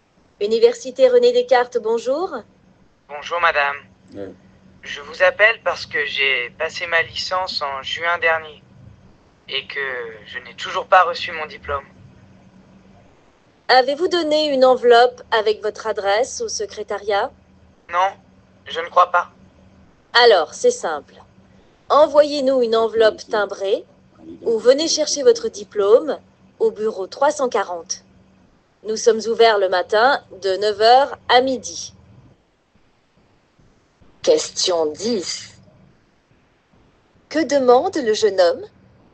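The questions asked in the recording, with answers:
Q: Que demande le jeune homme?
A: Il demande son diplôme de licence, qu'il n'a pas encore reçu.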